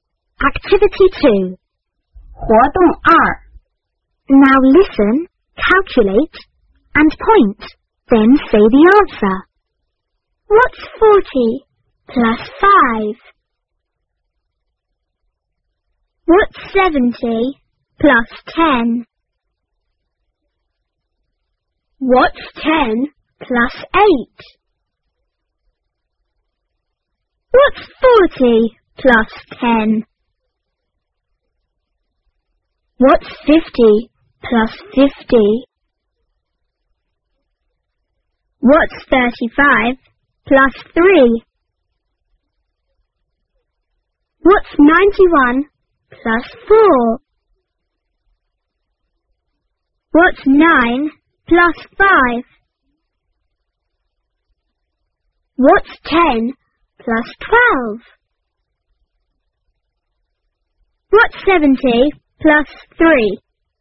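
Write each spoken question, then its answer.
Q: What's 40 plus 5?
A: 45

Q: What's 10 plus 8?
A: 18

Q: What's 40 plus 10?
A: 50

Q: What's 50 plus 50?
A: 100

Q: What's 35 plus 3?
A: 38

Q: What's 91 plus 4?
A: 95

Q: What's 9 plus 5?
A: 14

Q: What's 10 plus 12?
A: 22

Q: What's 70 plus 3?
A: 73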